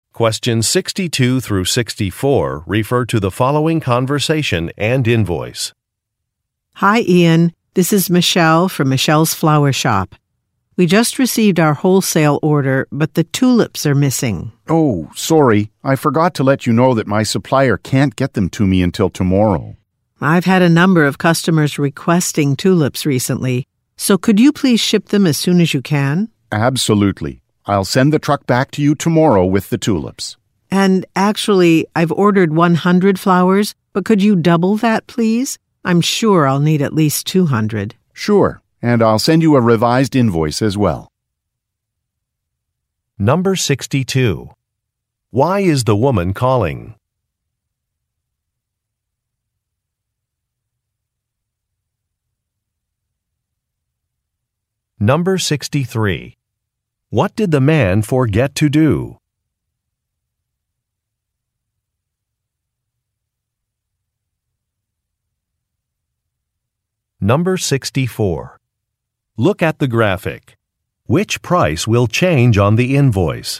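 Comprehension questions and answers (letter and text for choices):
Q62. Why is the woman calling?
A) To report that an order is incomplete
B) To report that some flowers are damaged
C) To ask for a discount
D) To check on a client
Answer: A) To report that an order is incomplete

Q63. What did the man forget to do?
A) To provide a discount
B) To meet with some clients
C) To report a delay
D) To correct an invoice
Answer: C) To report a delay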